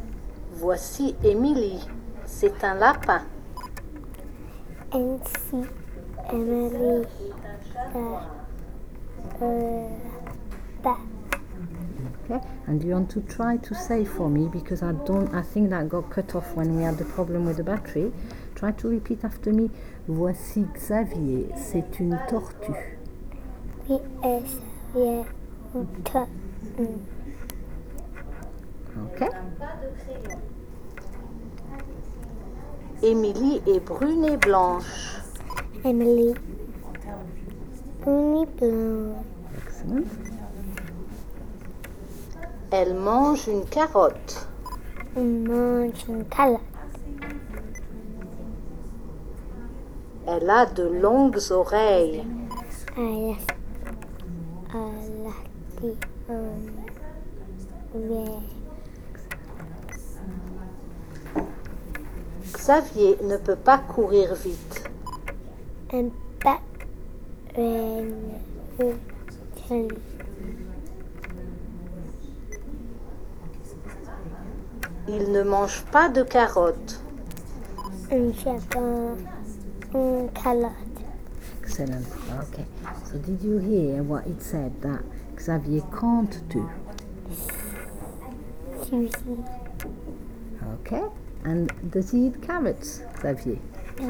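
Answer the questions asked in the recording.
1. Run fast
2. No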